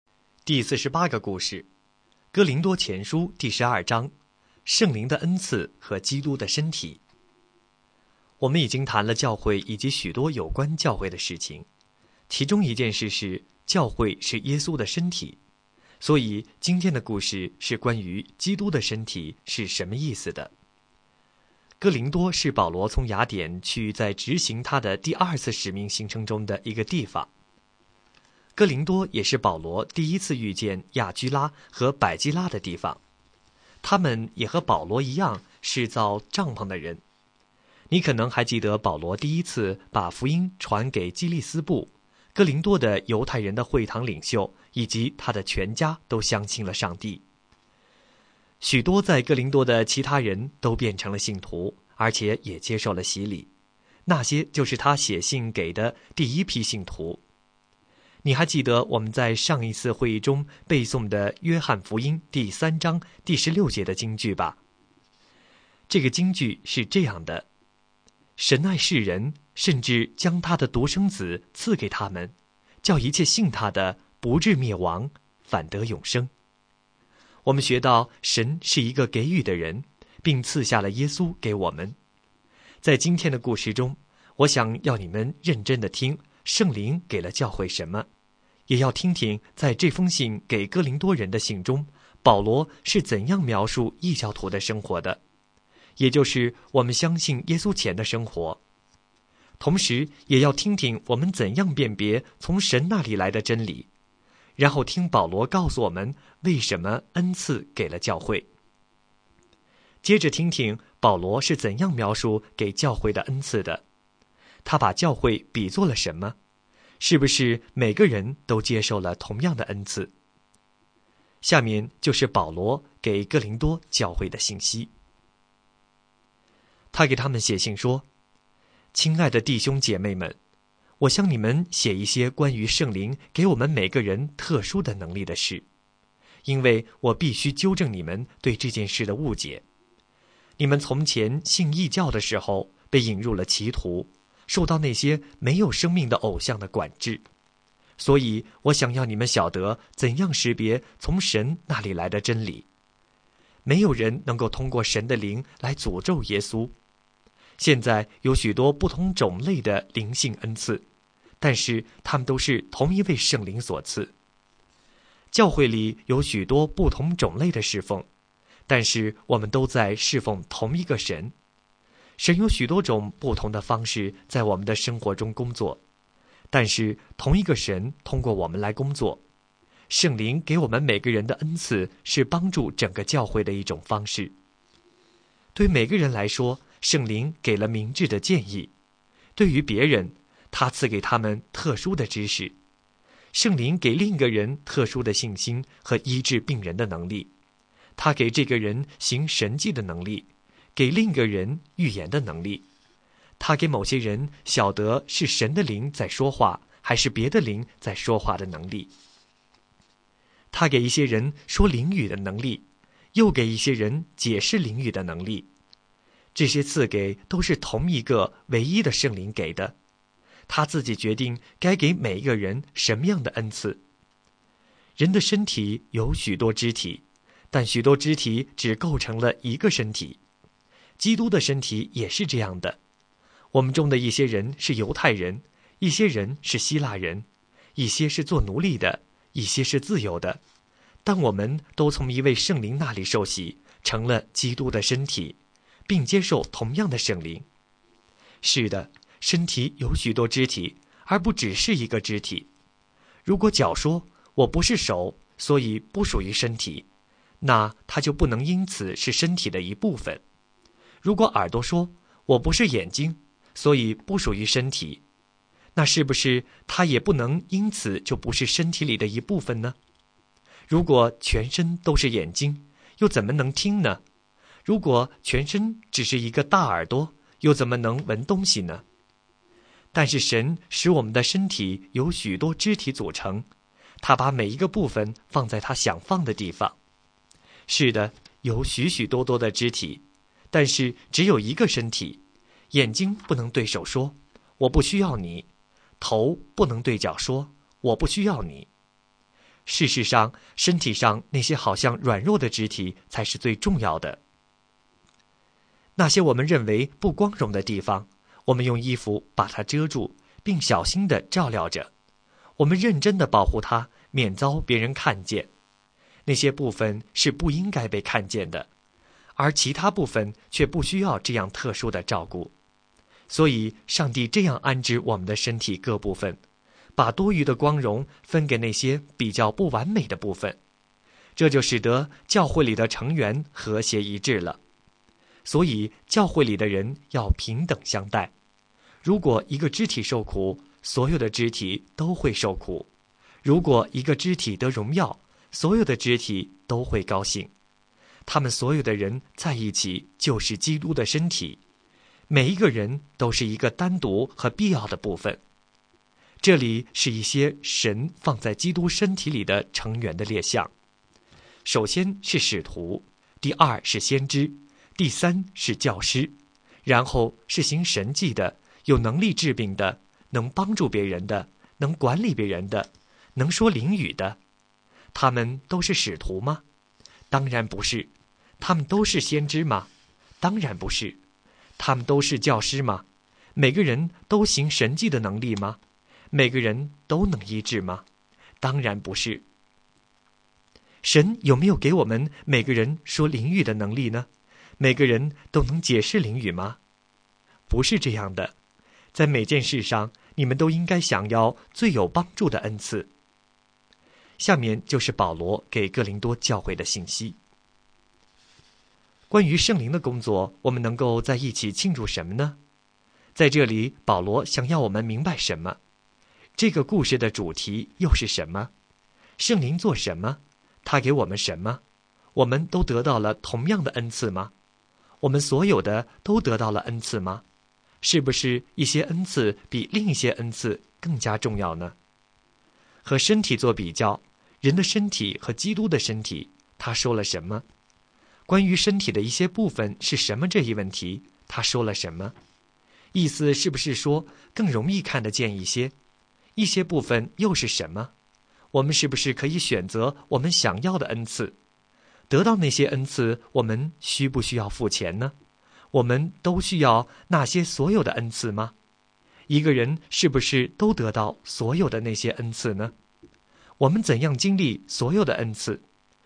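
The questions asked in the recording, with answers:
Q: 他给我们什么?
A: 各种不同的灵性恩赐(特殊的能力)

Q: 我们都得到了同样的恩赐吗?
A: 不是,圣灵给每个人不同的恩赐

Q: 和身体做比较,人的身体和基督的身体,他说了什么?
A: 身体有许多肢体,但只是一个身体;教会是基督的身体,每个人都是其中必要的部分

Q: 一个人是不是都得到所有的那些恩赐呢?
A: 不是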